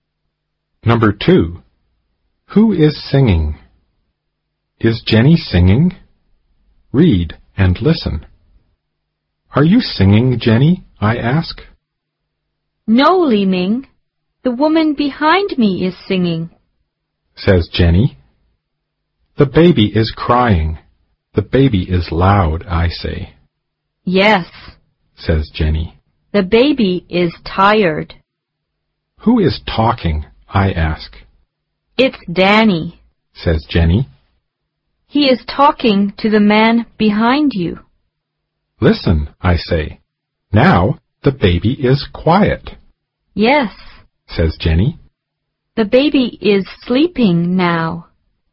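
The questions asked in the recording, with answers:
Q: Is Jenny singing?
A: No, the woman behind her is singing.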